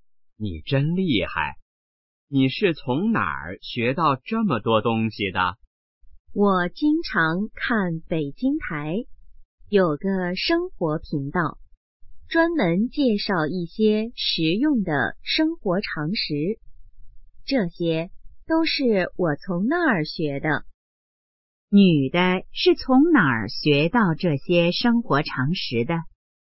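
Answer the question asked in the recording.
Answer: 北京台的生活频道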